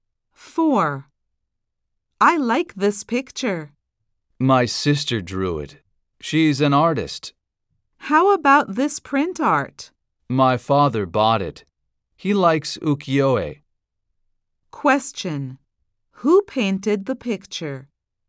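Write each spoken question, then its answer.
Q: Who painted the picture?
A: The speaker's sister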